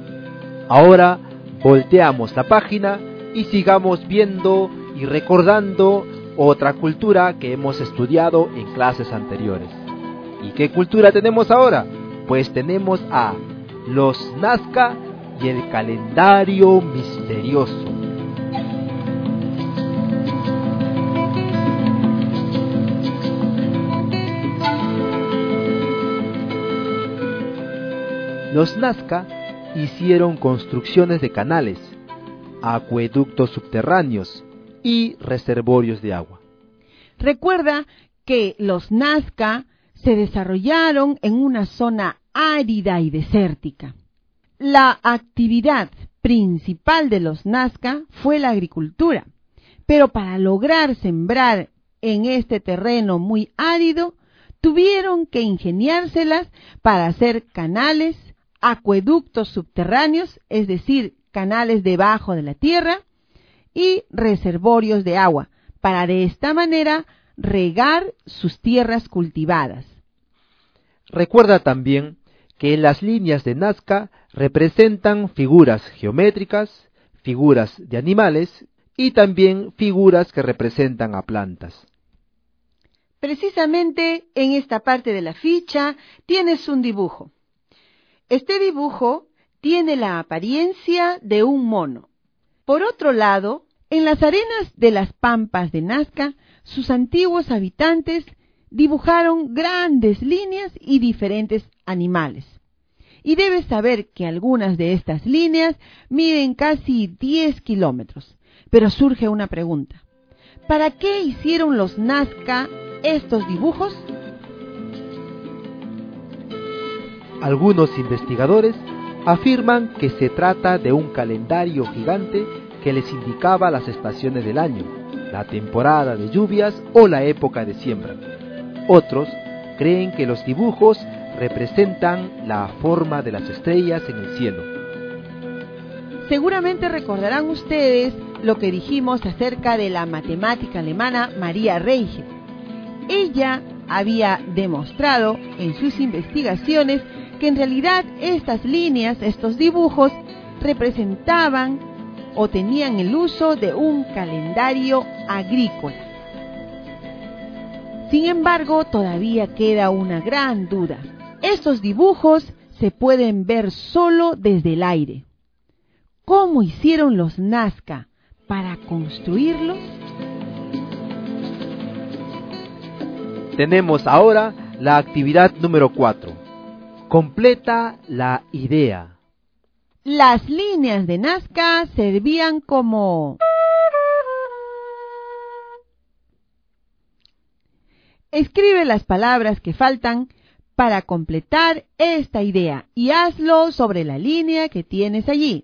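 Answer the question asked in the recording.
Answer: un calendario agrícola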